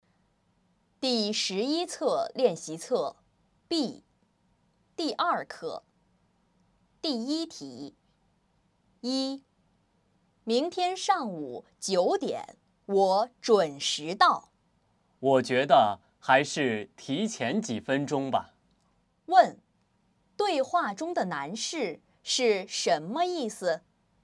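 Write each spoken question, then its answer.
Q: 对话中的男士是什么意思?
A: 应该提前几分钟到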